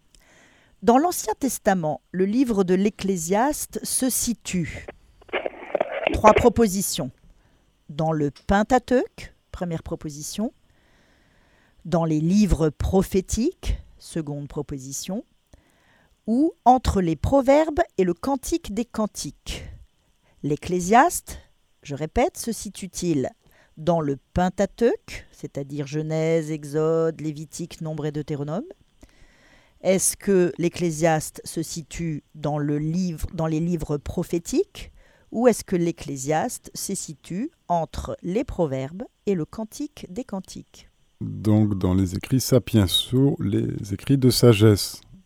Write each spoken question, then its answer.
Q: L'Ecclésiaste, je répète, se situe-t-il dans le Pentateuque, c'est-à-dire Genèse, Exode, Lévitique, Nombre et Deutéronome?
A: Le troisième, Marie.